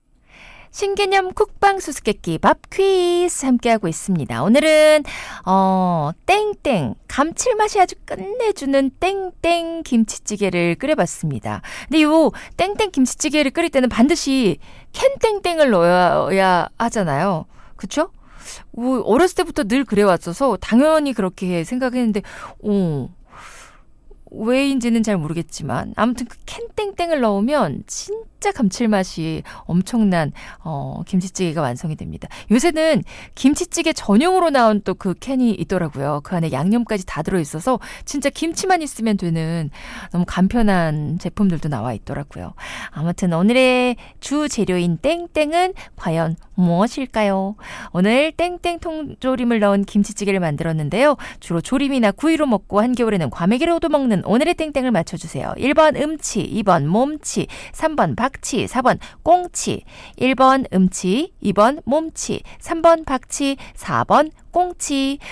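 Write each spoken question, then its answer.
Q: 주로 조림이나 구이로 먹고 한겨울에는 과메기로도 먹는 오늘의 땡땡을 맞춰주세요.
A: 4: 꽁치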